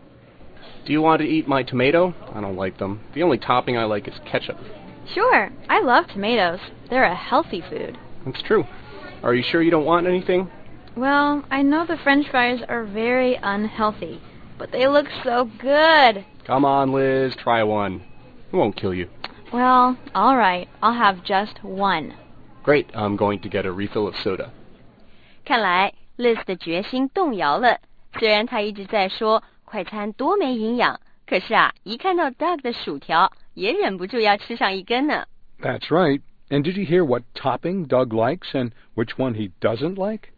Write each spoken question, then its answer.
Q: And did you hear what topping Doug likes and which one he doesn't like?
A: Doug 说在汉堡的所有佐料里啊,他只喜欢 ketchup, 番茄酱,还说他不爱吃番茄。